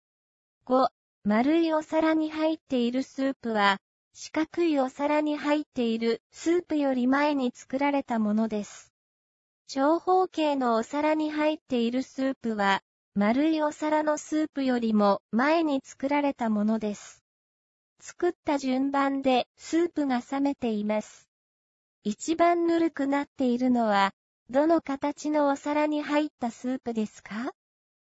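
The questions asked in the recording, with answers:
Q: 一番ぬるくなっているのは、どの形のお皿に入ったスープですか?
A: 長方形のお皿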